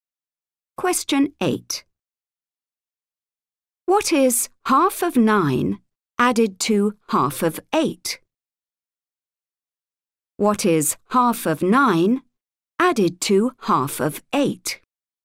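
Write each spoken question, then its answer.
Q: What is 9 added to 8?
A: 17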